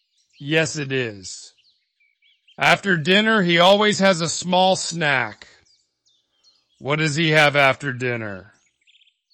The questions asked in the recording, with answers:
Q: What does he have after dinner?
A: A small snack. He has a small snack.